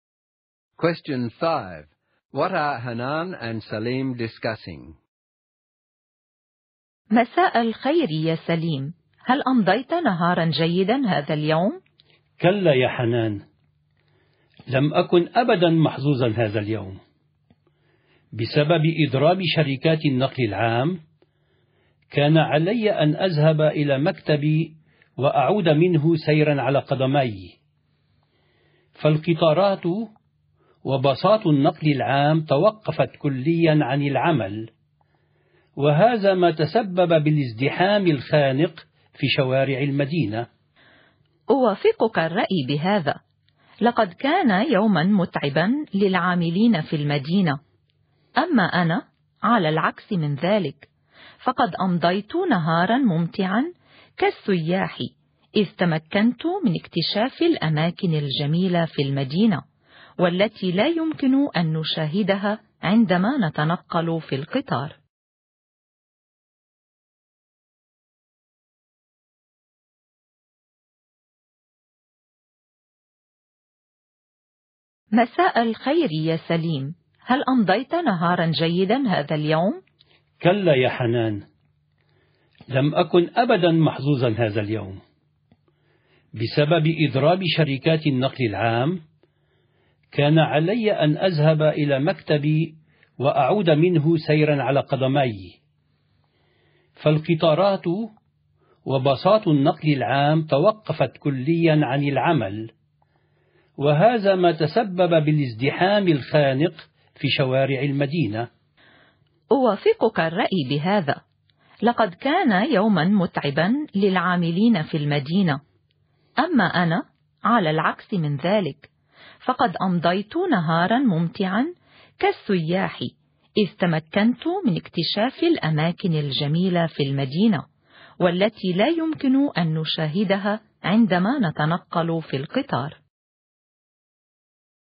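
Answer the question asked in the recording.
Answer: Their day during the public transport strike: Salim had to walk to work, while Hanan enjoyed exploring the city like a tourist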